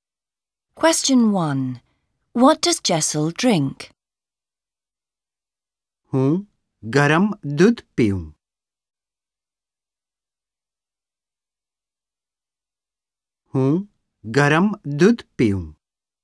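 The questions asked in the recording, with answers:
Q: What does Jessel drink?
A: Hot milk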